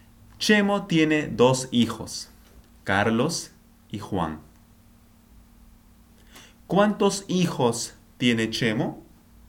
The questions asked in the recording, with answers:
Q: ¿Cuántos hijos tiene Chemo?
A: Dos, dos hijos. Chemo tiene dos hijos.